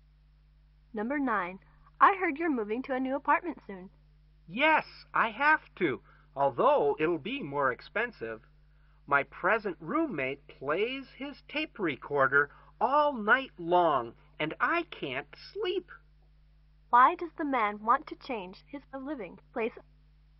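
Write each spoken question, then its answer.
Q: Why does the man want to change his living place?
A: His roommate plays his tape recorder all night and he can't sleep.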